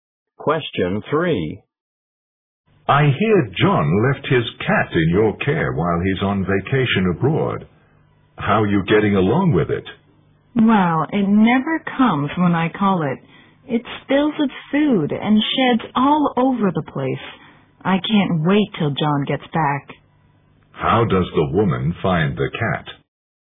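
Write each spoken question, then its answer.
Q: How does the woman find the cat?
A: It is a nuisance; she can't wait for John to come back.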